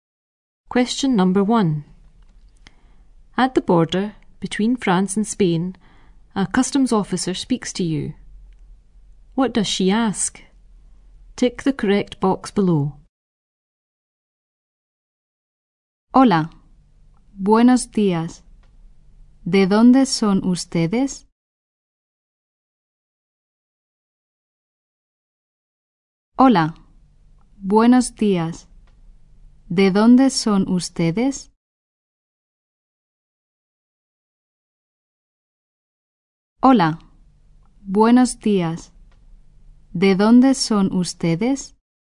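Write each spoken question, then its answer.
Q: What does she ask?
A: Where you are from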